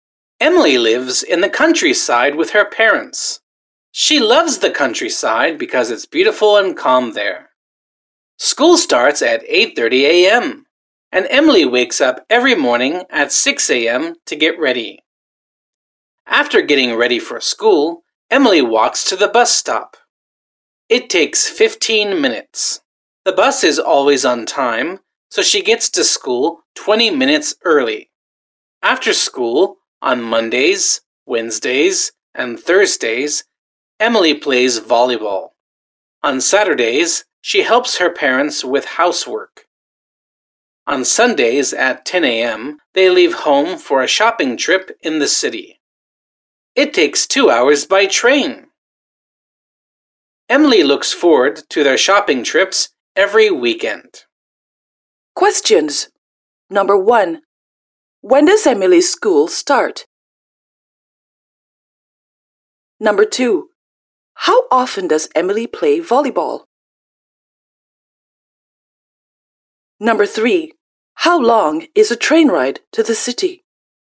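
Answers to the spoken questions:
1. At 8:30 a.m.
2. Three times a week (Mondays, Wednesdays, and Thursdays)
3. 2 hours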